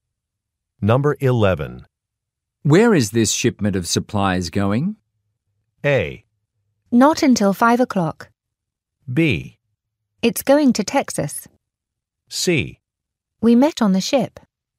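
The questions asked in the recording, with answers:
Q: Where is this shipment of supplies going?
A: B: It's going to Texas.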